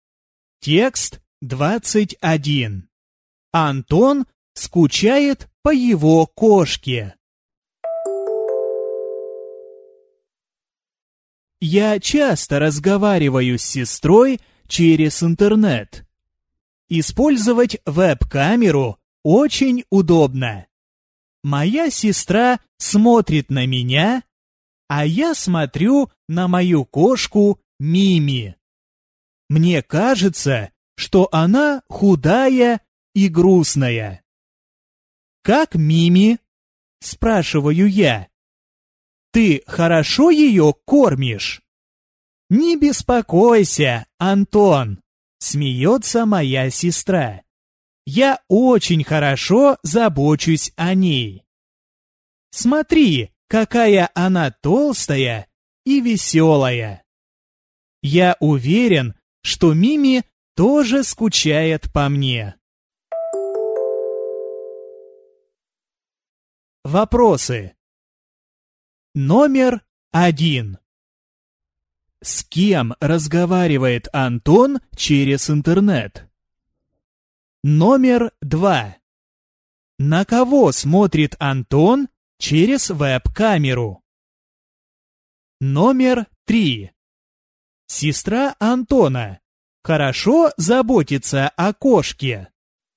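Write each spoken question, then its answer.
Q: С кем разговаривает Антон через интернет?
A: С сестрой

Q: На кого смотрит Антон через веб-камеру?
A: На свою кошку Мими

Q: Сестра Антона хорошо заботится о кошке.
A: Да, правда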